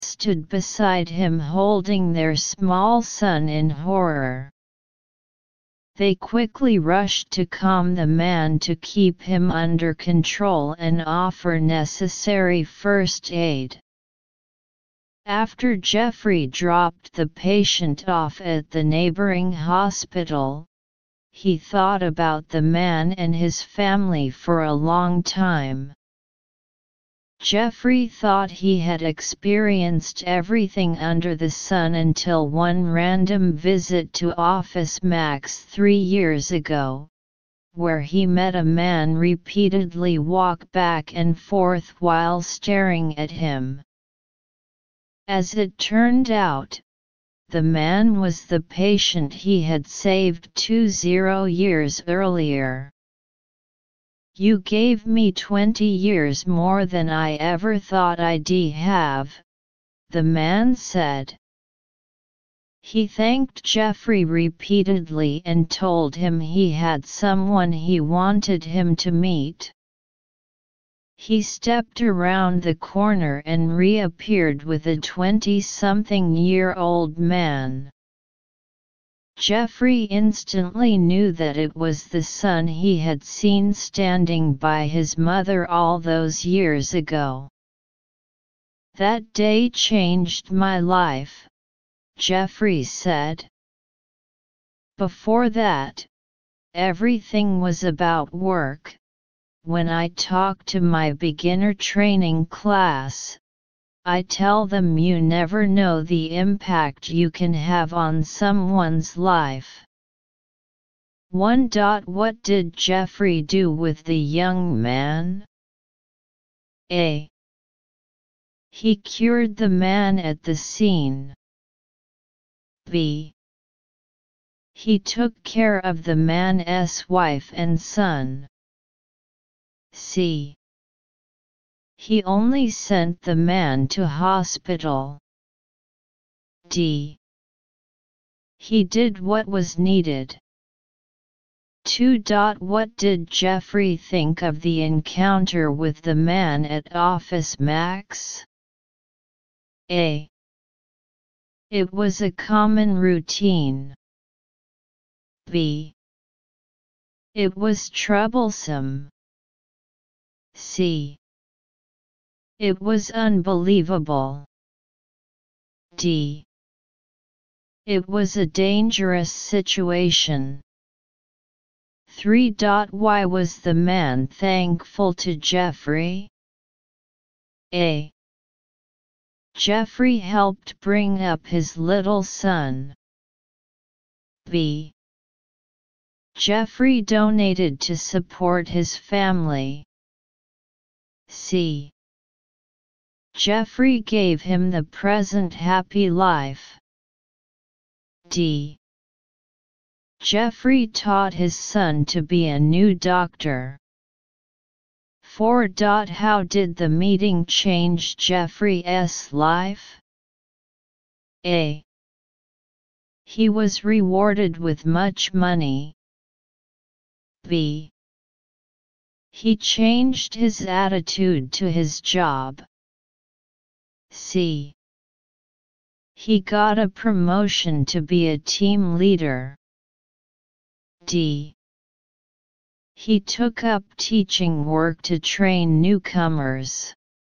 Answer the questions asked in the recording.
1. So choose option D.
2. So choose option C.
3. So choose option C.
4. So choose option B.